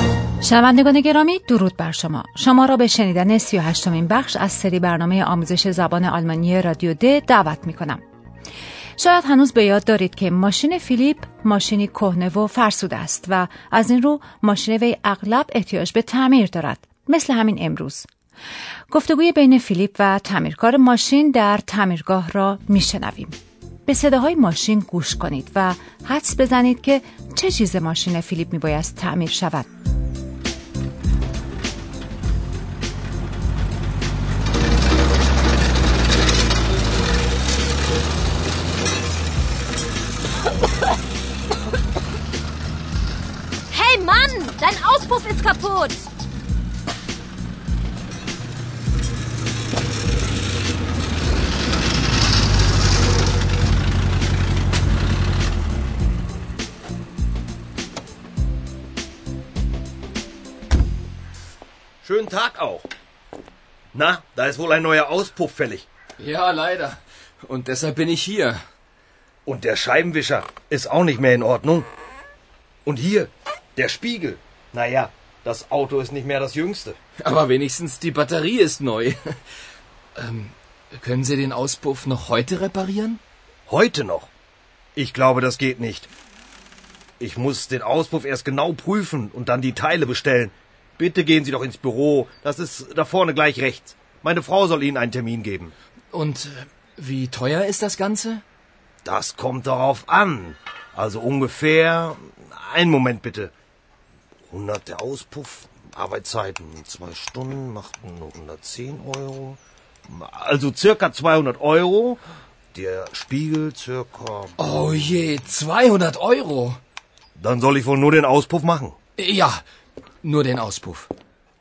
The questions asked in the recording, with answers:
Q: حدس بزنید که چه چیز ماشین فیلیپ بایست تعمیر شود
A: آسپوف یعنی لوله اگزوز ماشین فیلیپ خراب است و میبایست تعمیر شود.